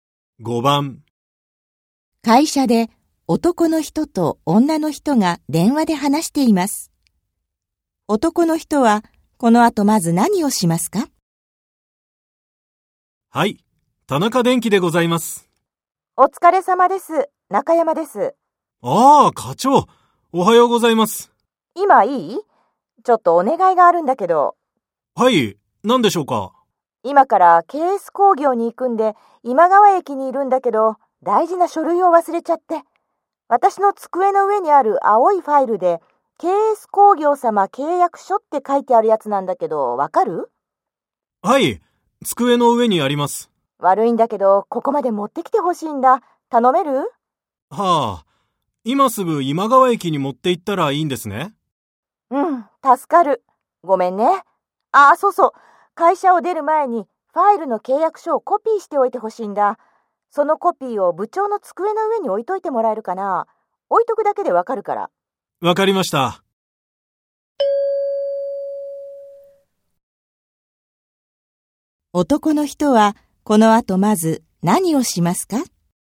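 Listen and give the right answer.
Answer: ファイルの契約書をコピーする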